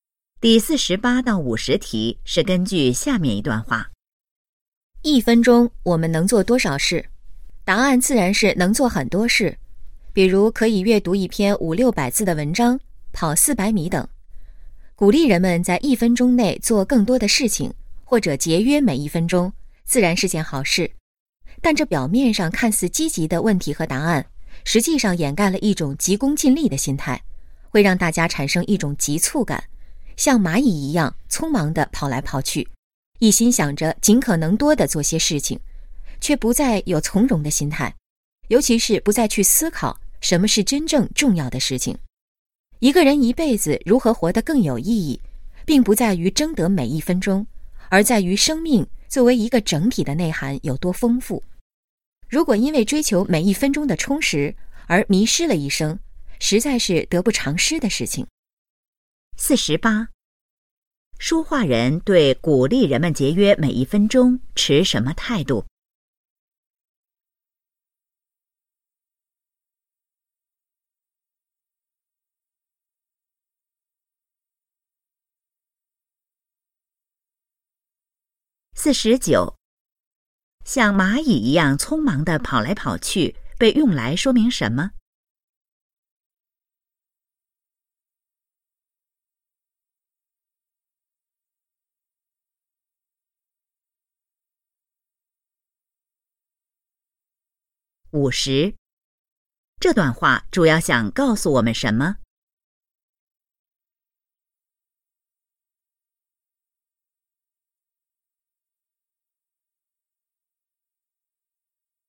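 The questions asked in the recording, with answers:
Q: 像蚂蚁一样匆忙地跑来跑去,被用来说明什么?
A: 人们急功近利,缺少从容的心态

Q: 这段话主要想告诉我们什么?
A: 人生的意义不在于争得每一分钟,而在于生命整体内涵的丰富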